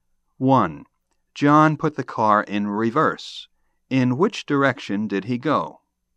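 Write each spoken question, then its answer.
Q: In which direction did he go?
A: Backward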